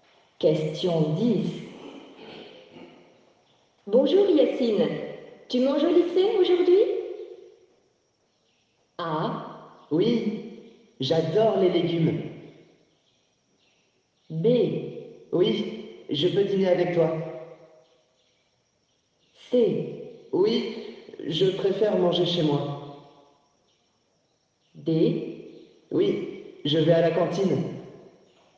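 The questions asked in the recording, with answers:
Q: Bonjour Yacine, tu manges au lycée aujourd'hui?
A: D: Oui, je vais à la cantine.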